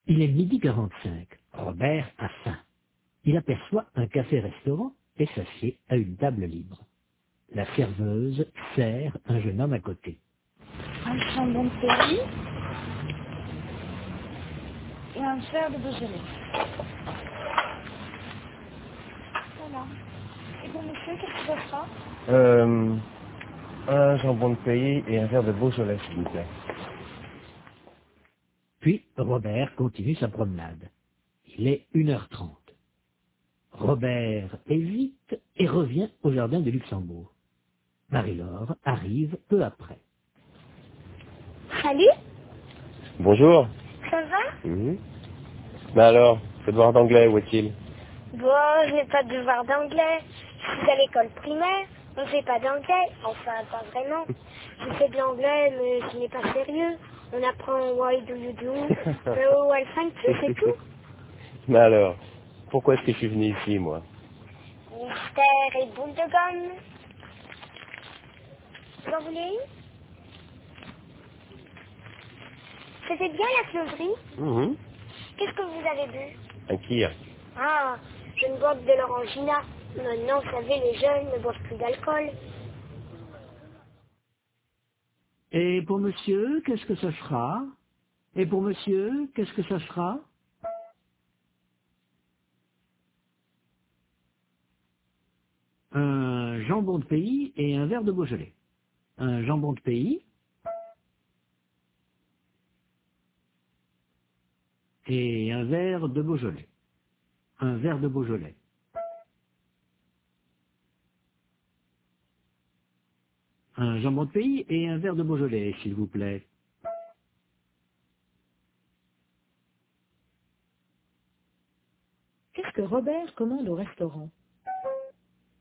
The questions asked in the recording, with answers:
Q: Qu'est-ce que Robert commande au restaurant?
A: Un jambon de pays et un verre de Beaujolais.